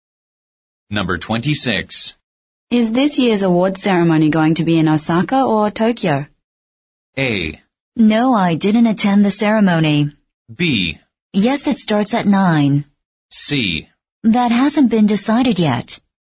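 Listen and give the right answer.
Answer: C: That hasn't been decided yet.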